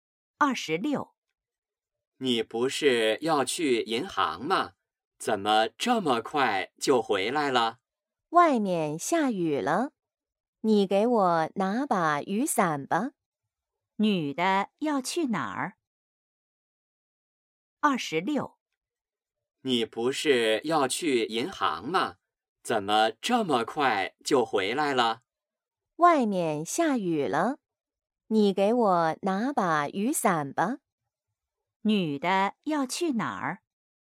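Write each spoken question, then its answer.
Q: 女的要去哪儿?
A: 银行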